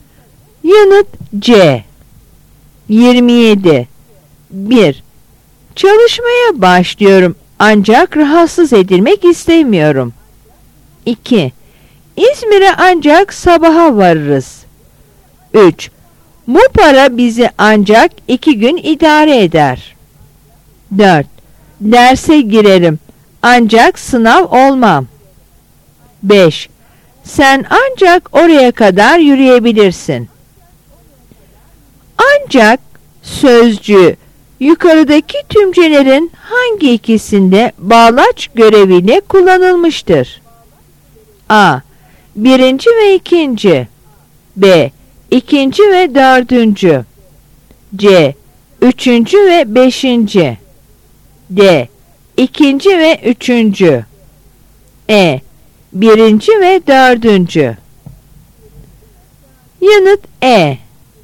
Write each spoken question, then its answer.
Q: Ancak sözcüğü yukarıdaki tümcelerin hangi ikisinde bağlaç görevine kullanılmıştır?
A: Yanıt E.